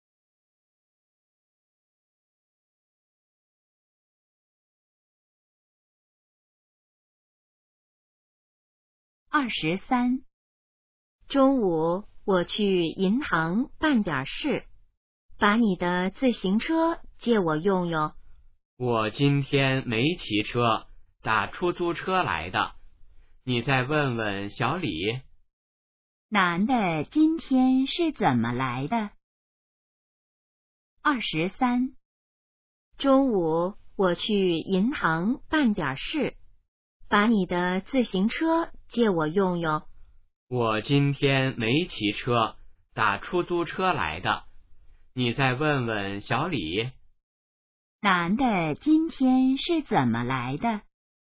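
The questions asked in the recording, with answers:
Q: 男的今天是怎么来的?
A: 打出租车来的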